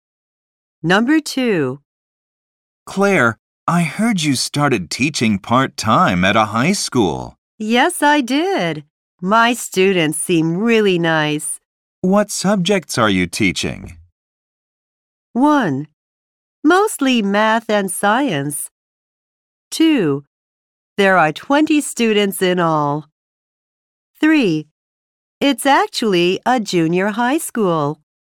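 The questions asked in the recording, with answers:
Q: What subjects are you teaching?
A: 1: Mostly math and science.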